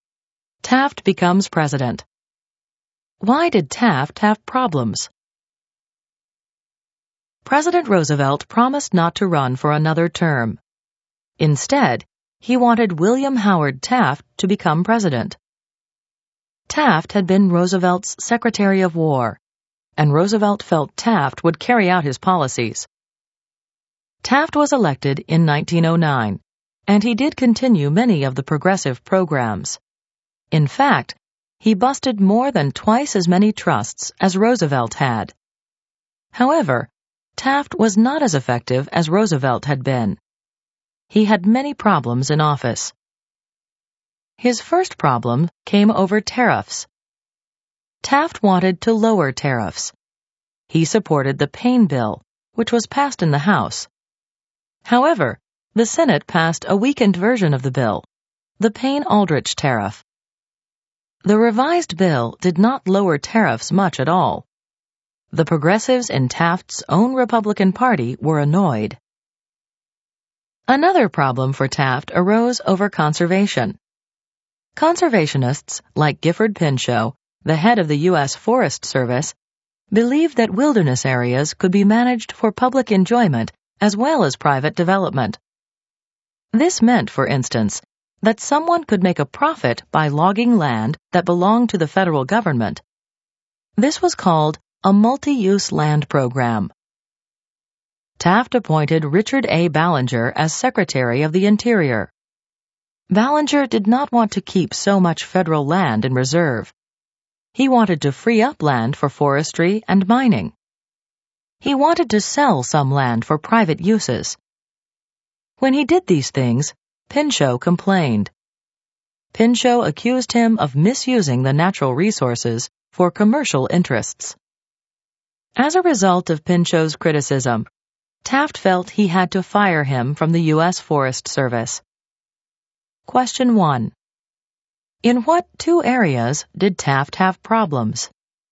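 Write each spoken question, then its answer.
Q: In what two areas did Taft have problems?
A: Tariffs and conservation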